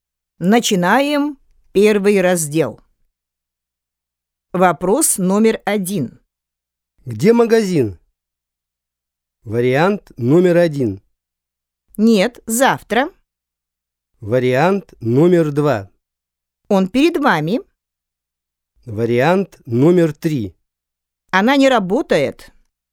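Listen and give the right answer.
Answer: 2: Он перед вами.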